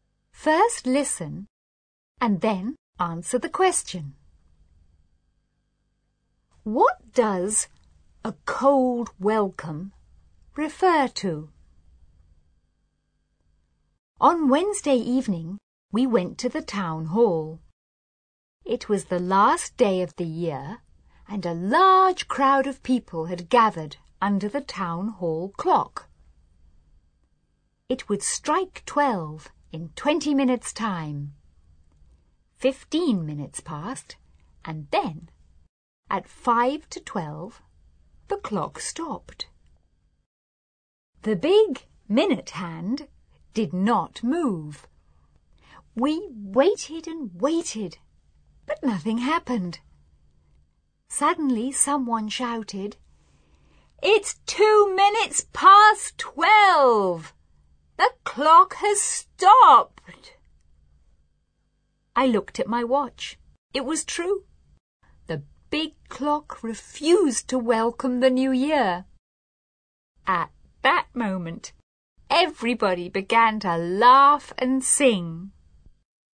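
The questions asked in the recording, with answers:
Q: What does a cold welcome refer to?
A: The town hall clock stopped before midnight and did not welcome the new year.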